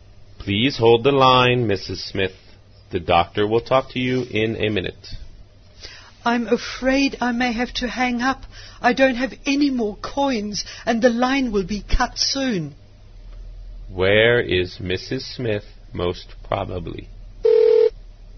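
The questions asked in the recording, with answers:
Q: Where is Mrs. Smith, most probably?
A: In a public phone booth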